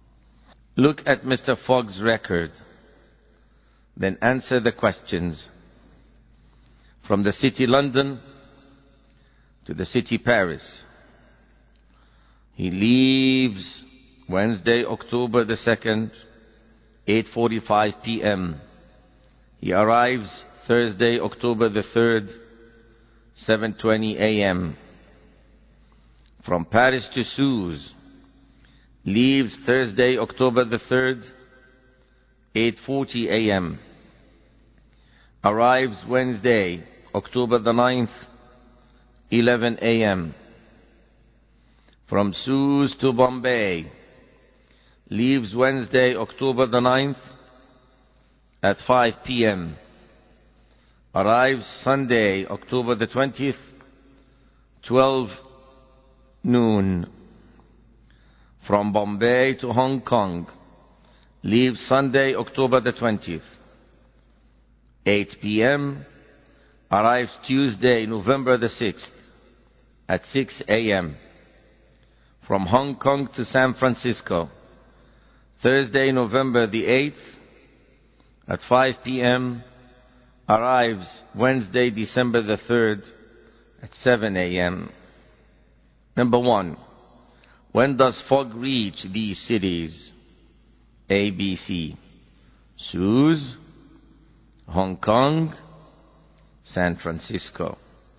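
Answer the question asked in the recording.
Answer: Suez: Wednesday, October 9th, 11 a.m.; Hong Kong: Tuesday, November 6th, 6 a.m.; San Francisco: Wednesday, December 3rd, 7 a.m.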